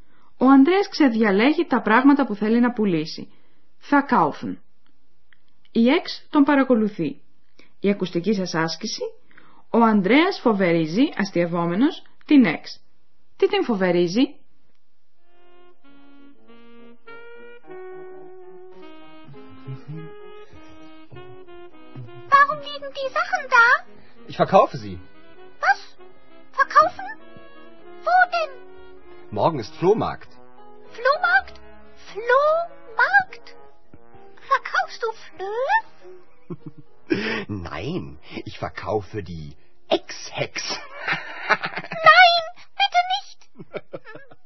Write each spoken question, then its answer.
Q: Τι την φοβερίζει?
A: Ο Ανδρέας φοβερίζει την Εξ πως θα την πουλήσει και αυτήν όπως και τα παλιοπράγματά του.